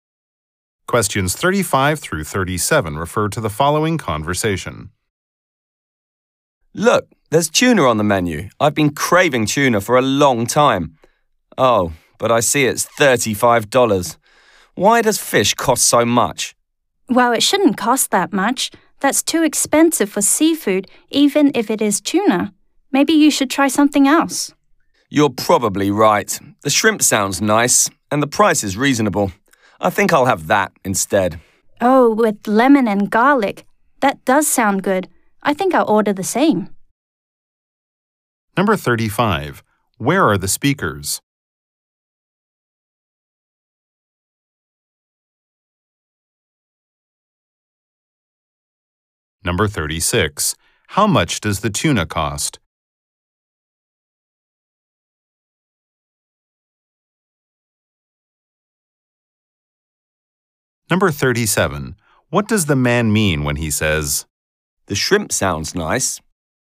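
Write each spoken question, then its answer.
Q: Where are the speakers?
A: In a restaurant.

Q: How much does the tuna cost?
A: $35

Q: What does the man mean when he says,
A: He will order the shrimp.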